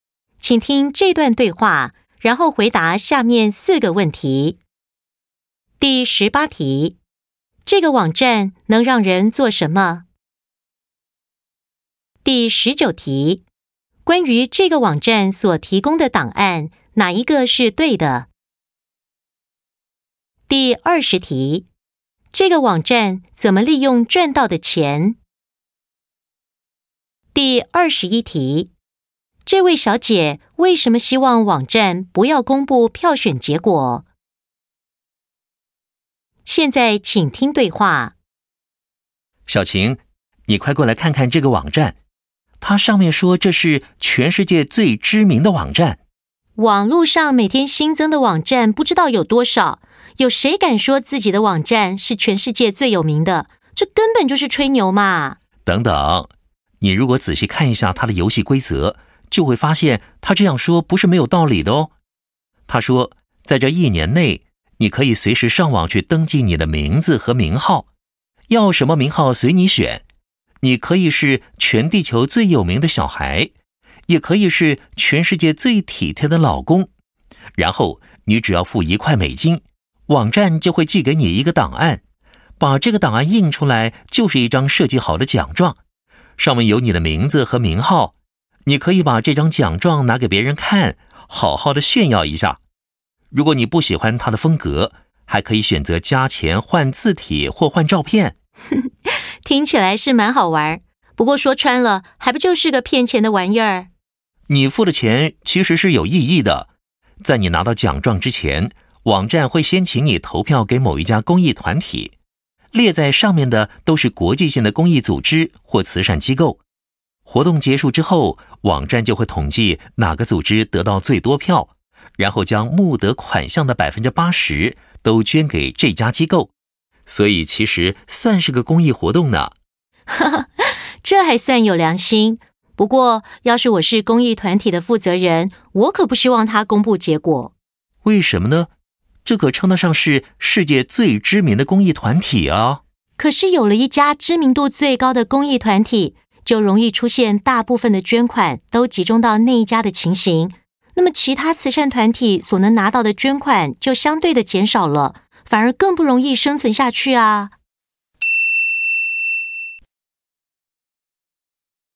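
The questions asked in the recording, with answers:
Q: 这个网站能让人做什么?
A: 付钱登记自己的名字和名号,获得一张印有名字和名号的奖状

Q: 这个网站怎么利用赚到的钱?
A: 将募得款项的80%捐给得票最多的公益团体

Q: 这位小姐为什么希望网站不要公布票选结果?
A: 捐款会集中到最知名的那一家,其他慈善团体拿到的捐款减少,更难生存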